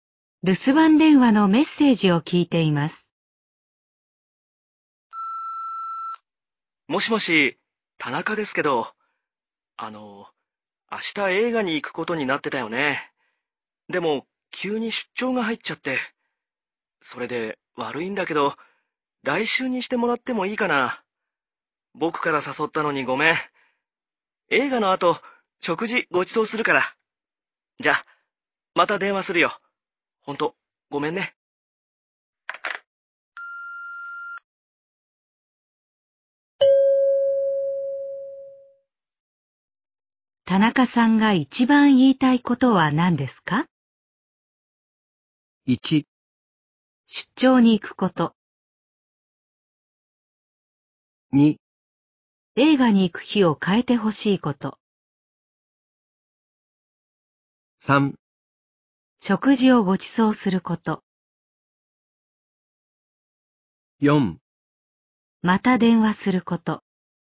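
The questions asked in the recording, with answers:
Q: 田中さんが一番言いたいことは何ですか?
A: 2: 映画に行く日を変えてほしいこと。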